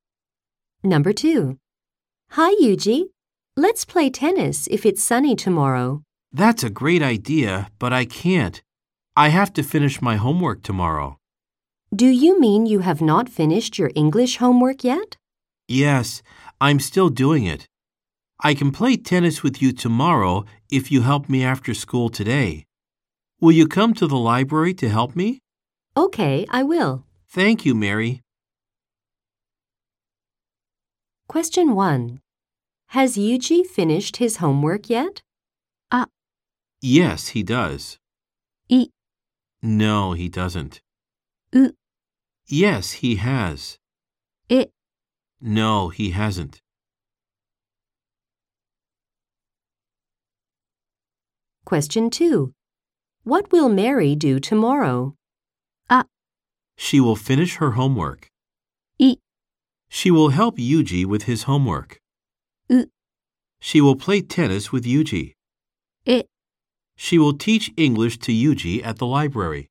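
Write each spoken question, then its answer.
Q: Has Yuji finished his homework yet?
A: え: No, he hasn't.

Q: What will Mary do tomorrow?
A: う: She will play tennis with Yuji.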